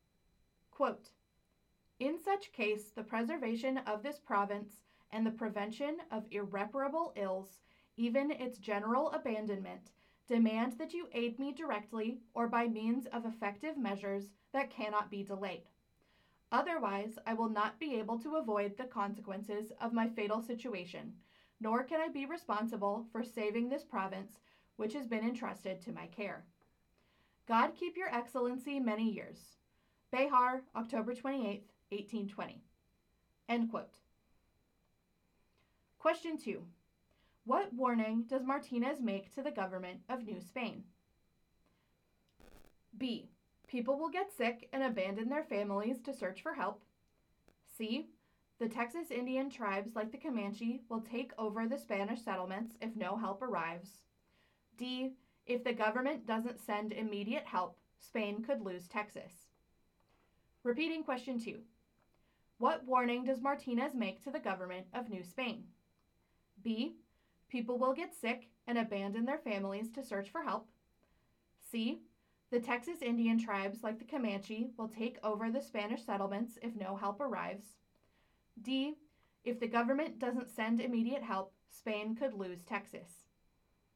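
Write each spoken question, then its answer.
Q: What warning does Martinez make to the government of New Spain?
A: D: If the government doesn't send immediate help, Spain could lose Texas.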